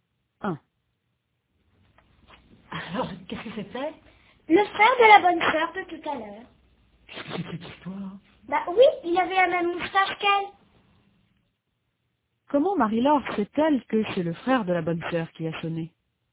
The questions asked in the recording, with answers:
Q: Comment Marie-Laure sait-elle que c'est le frère de la bonne sœur qui a sonné ?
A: Parce qu'il avait la même moustache qu'elle.